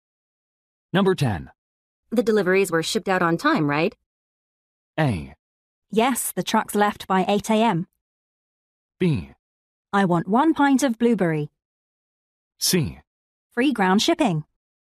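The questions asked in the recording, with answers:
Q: The deliveries were shipped out on time, right?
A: A: Yes, the trucks left by 8 a.m.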